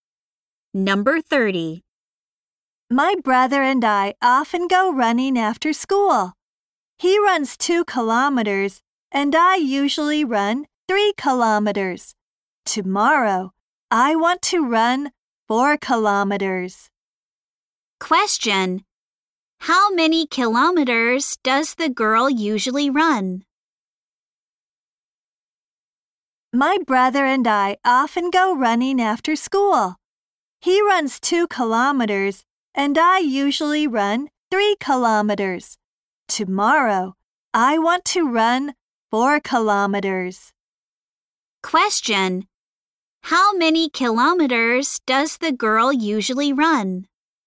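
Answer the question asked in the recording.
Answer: 3 kilometers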